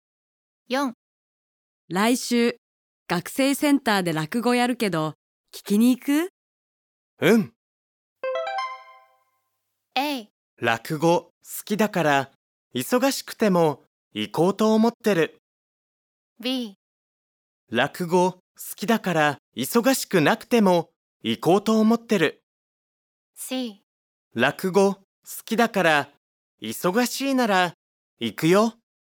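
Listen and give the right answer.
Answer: A: 落語好きだから忙しくても行こうと思ってる。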